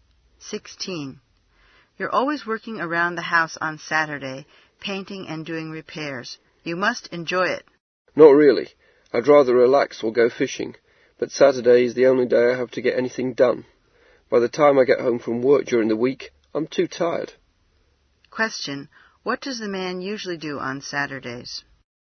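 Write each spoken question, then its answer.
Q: What does the man usually do on Saturdays?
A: Works around the house, painting and doing repairs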